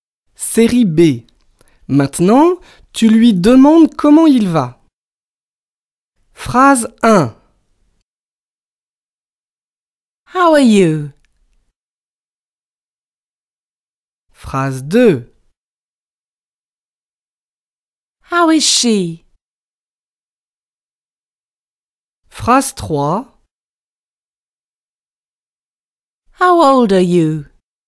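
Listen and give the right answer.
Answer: 1: How are you?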